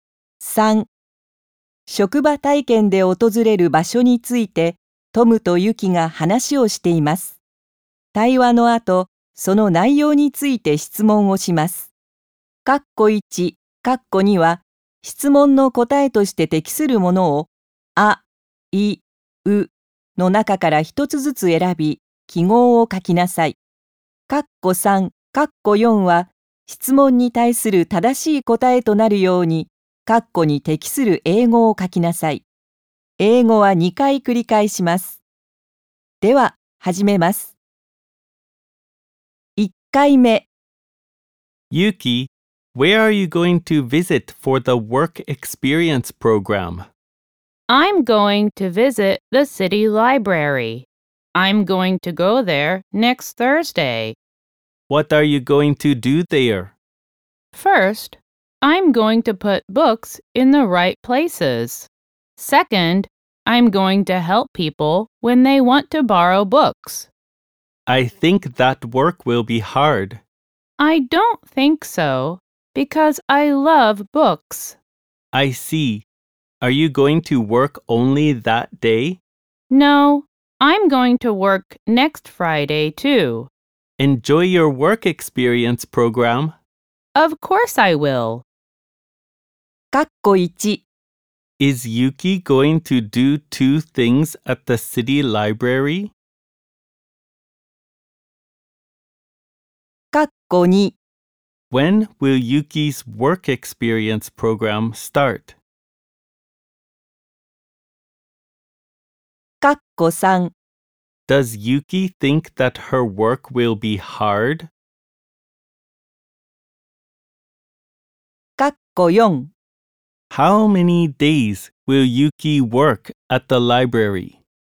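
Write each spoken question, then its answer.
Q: Is Yuki going to do 2 things at the city library?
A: Yes, she is.

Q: When will Yuki's work experience program start?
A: Next Thursday.

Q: Does Yuki think that her work will be hard?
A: No, she doesn't.

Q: How many days will Yuki work at the library?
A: Two days.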